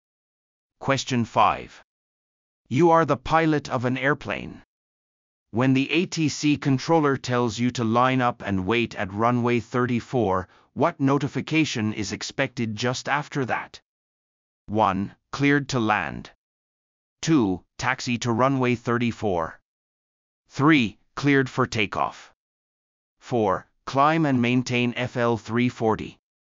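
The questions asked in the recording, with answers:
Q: When the ATC controller tells you to line up and wait at runway 34, what notification is expected just after that?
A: 3: Cleared for takeoff.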